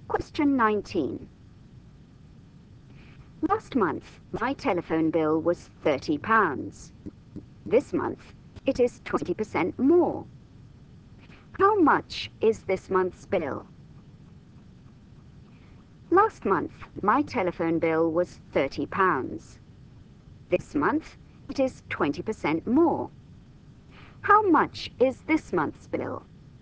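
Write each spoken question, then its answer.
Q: How much is this month's bill?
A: £36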